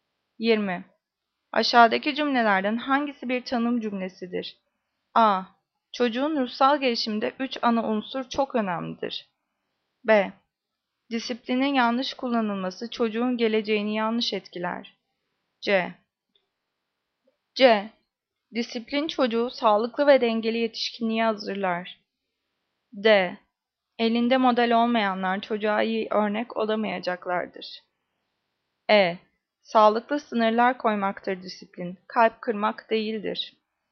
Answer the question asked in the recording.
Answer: Cevap E. Sağlıklı sınırlar koymaktır disiplin.